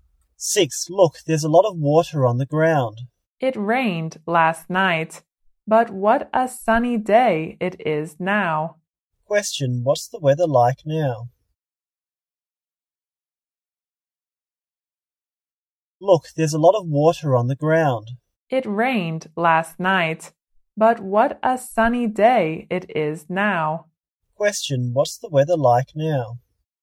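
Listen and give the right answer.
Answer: Sunny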